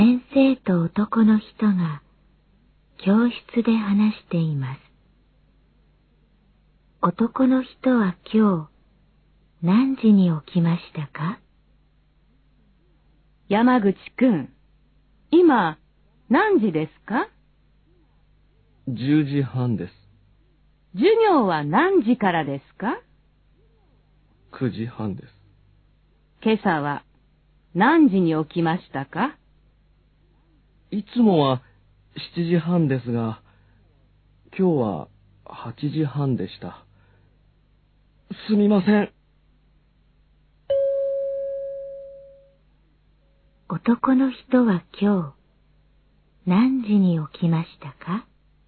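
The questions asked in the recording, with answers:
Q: 男の人は今日何時に起きましたか?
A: 8時半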